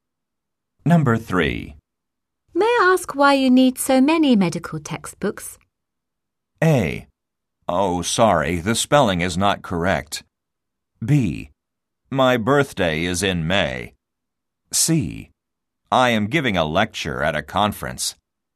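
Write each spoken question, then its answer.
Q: May I ask why you need so many medical textbooks?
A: C: I am giving a lecture at a conference.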